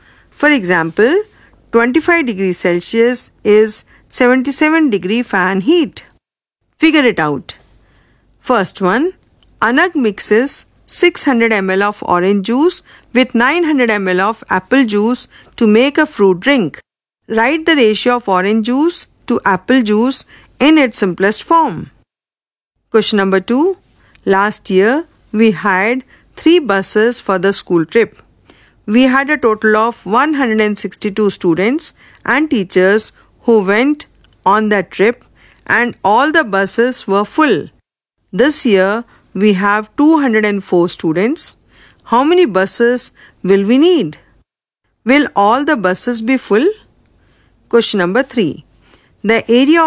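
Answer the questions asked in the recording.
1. 2:3
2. 4 buses
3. No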